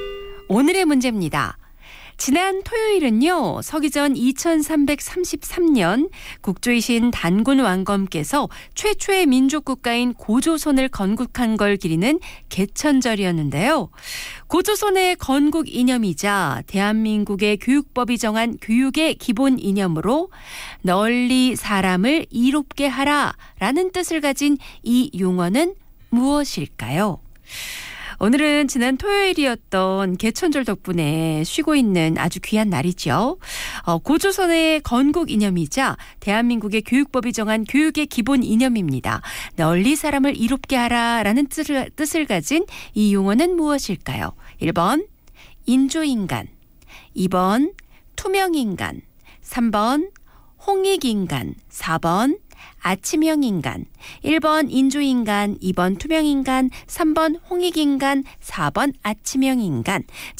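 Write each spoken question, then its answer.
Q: 고조선의 건국 이념이자 대한민국의 교육법이 정한 교육의 기본 이념으로 널리 사람을 이롭게 하라 라는 뜻을 가진 이 용어는 무엇일까요?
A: 3: 홍익인간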